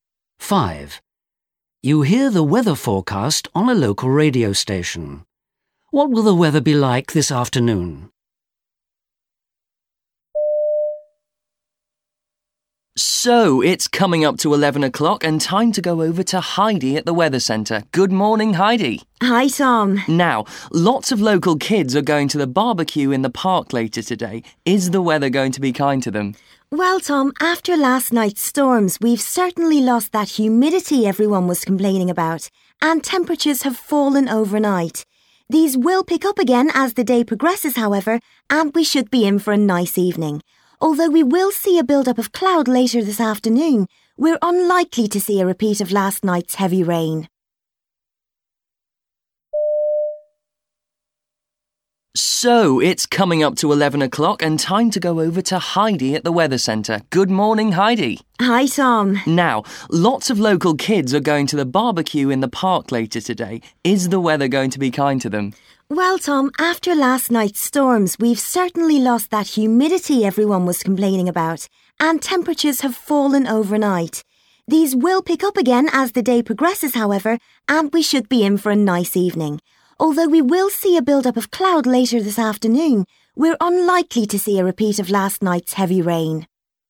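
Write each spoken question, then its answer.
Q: What will the weather be like this afternoon?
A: Cloudier but dry, with temperatures rising.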